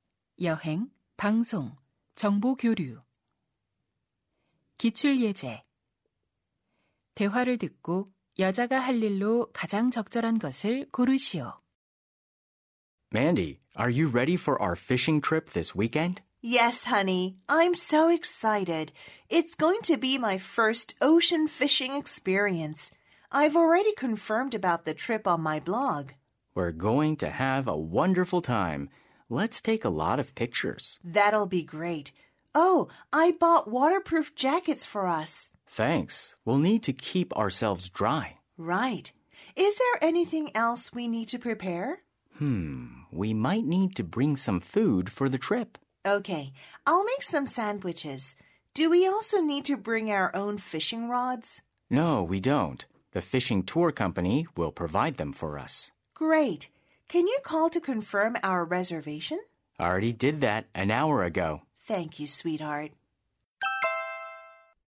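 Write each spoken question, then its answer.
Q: 대화를 듣고 여자가 할 일로 가장 적절한 것을 고르시오.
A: 샌드위치 만들기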